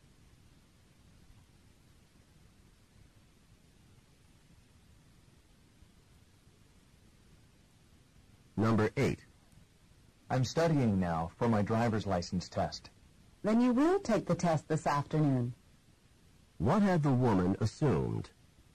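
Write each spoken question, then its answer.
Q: What had the woman assumed?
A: That the man would not take the test this afternoon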